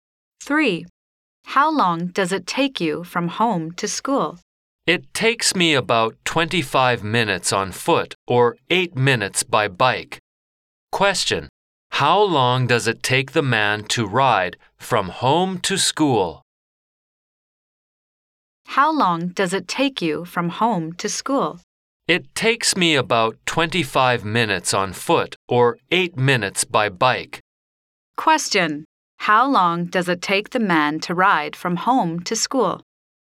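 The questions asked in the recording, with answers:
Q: how long does it take the man to ride from home to school?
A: 8 minutes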